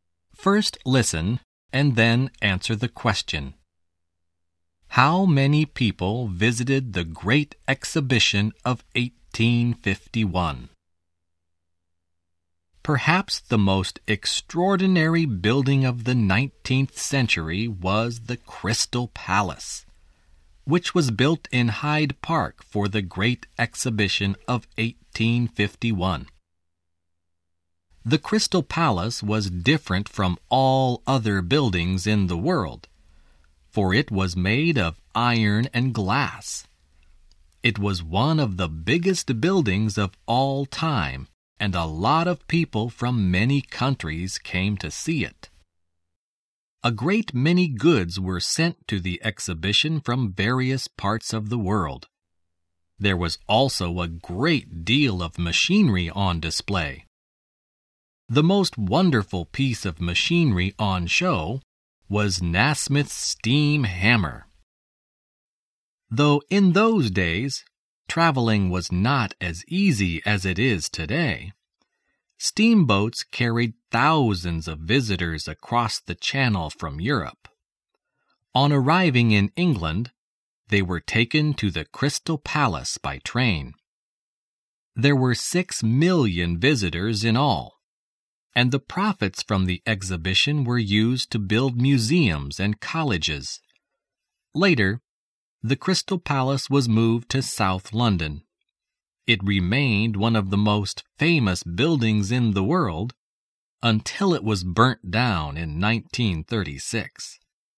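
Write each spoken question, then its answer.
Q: How many people visited the Great Exhibition of 1851?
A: 6 million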